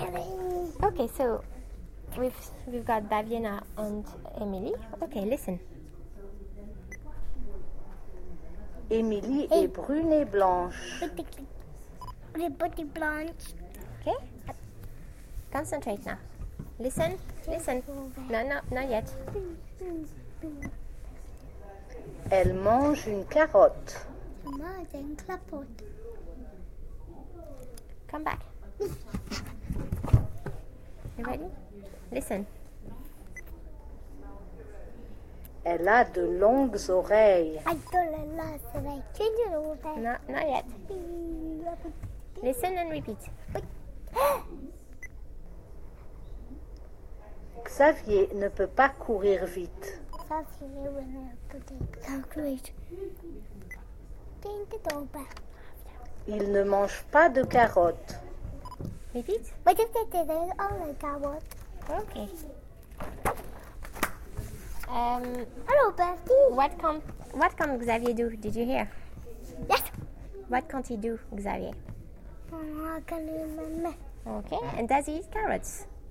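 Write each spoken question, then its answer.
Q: What can't he do, Xavier?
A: Run fast

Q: Okay, and does he eat carrots?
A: No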